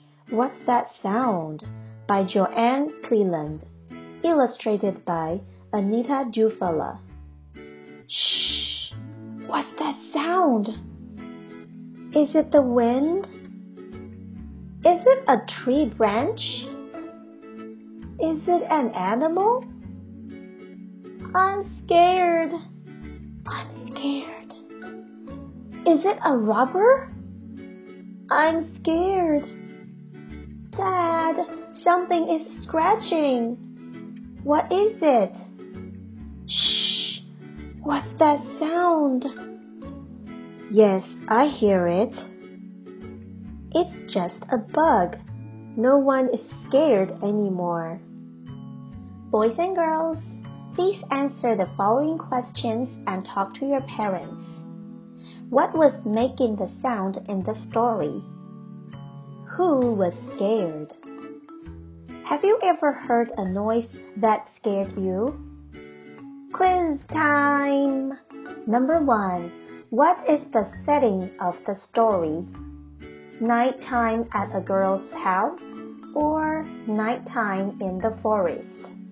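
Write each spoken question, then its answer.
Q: What was making the sound in the story?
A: A bug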